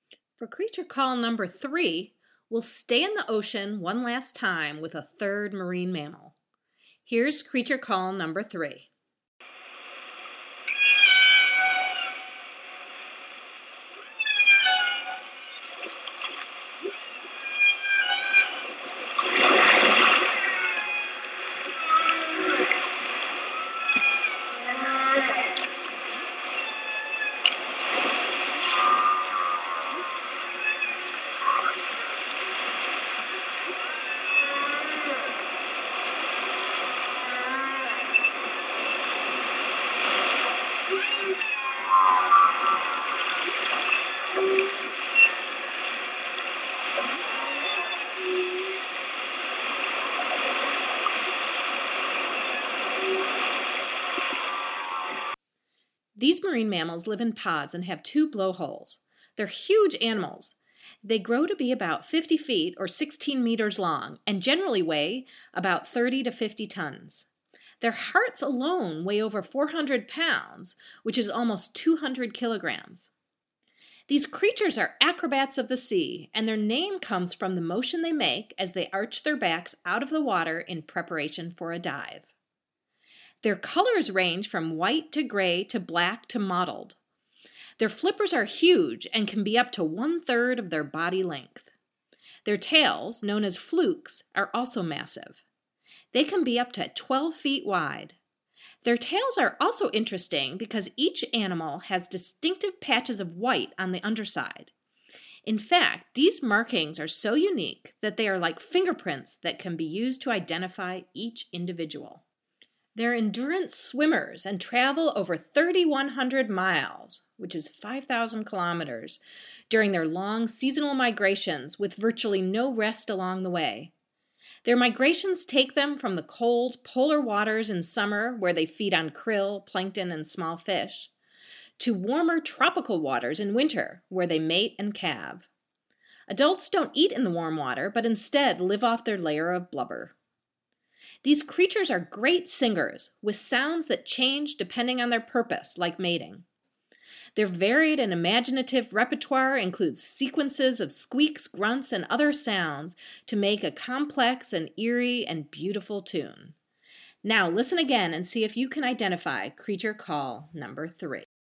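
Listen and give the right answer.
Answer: humpback whale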